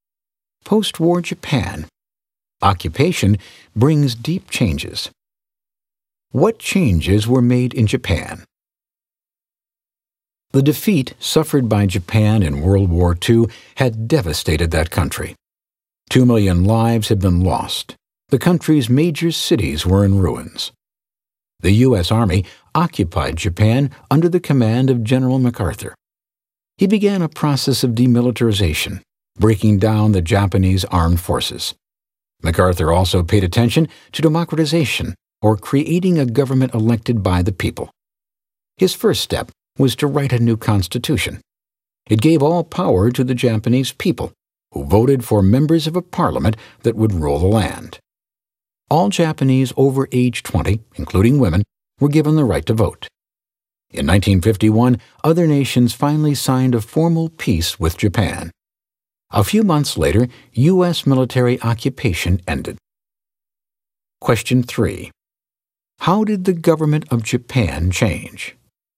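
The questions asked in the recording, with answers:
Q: How did the government of Japan change?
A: A new constitution made it a democracy: the people, including women over 20, elected a parliament to rule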